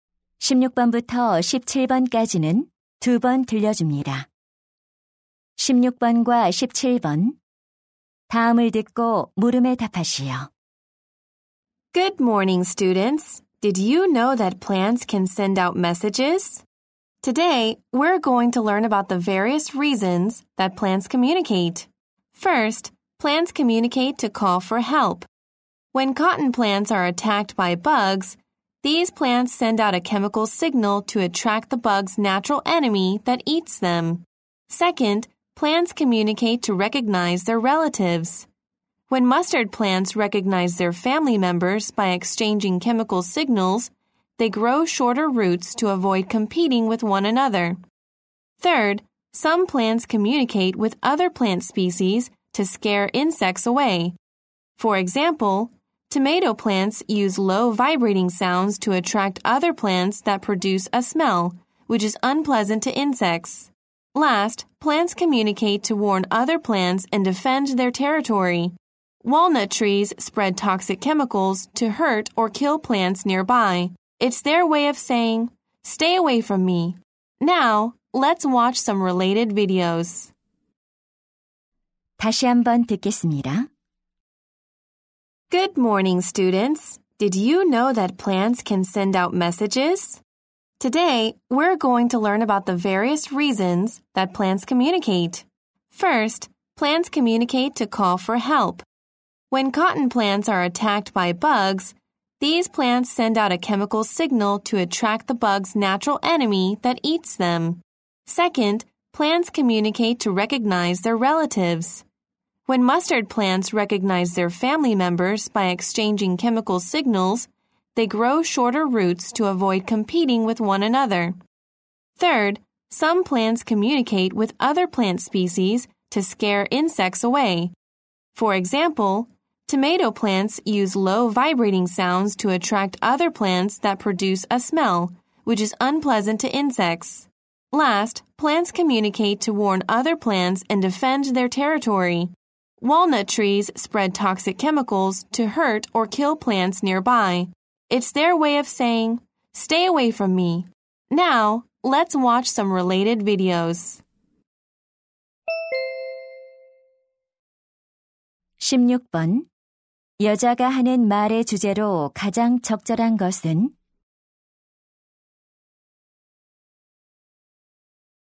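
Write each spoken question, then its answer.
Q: 여자가 하는 말의 주제로 가장 적절한 것은?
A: 식물이 의사소통하는 다양한 이유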